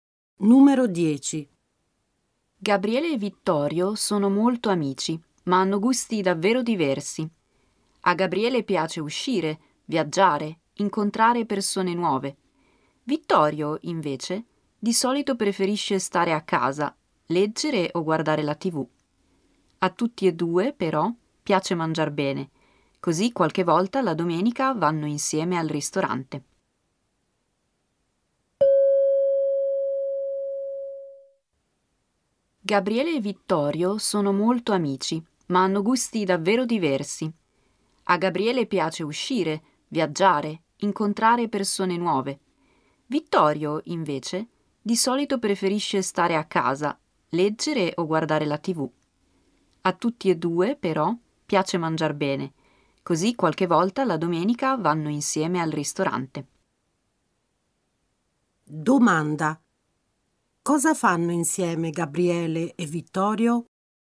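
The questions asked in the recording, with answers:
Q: Cosa fanno insieme Gabriele e Vittorio?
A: Qualche volta la domenica vanno al ristorante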